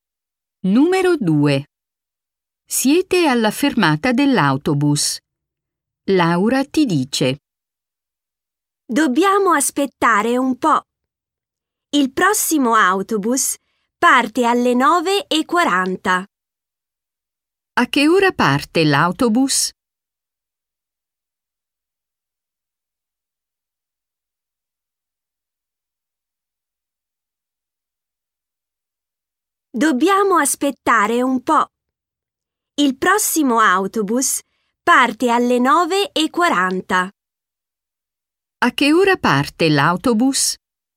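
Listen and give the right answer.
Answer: Alle 9:40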